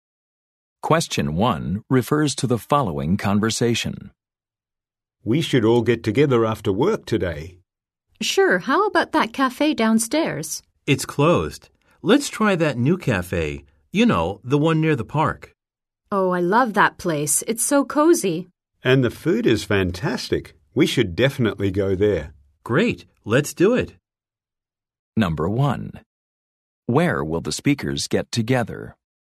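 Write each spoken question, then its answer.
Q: Where will the speakers get together?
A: At the new cafe near the park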